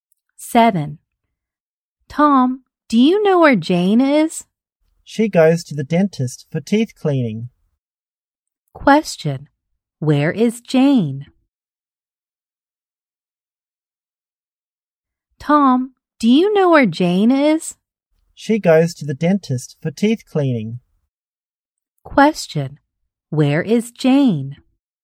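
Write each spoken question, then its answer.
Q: Where is Jane?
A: At the dentist.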